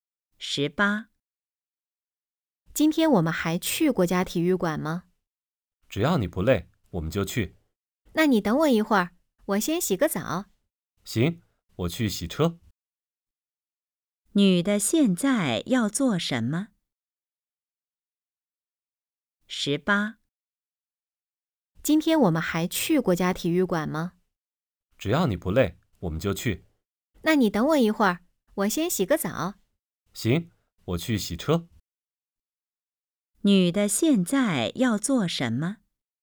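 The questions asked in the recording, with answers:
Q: 女的现在要做什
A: 洗澡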